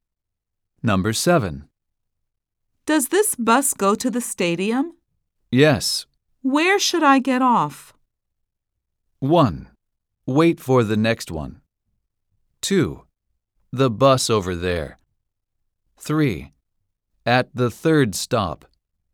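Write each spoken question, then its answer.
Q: Where should I get off?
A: 3: At the third stop.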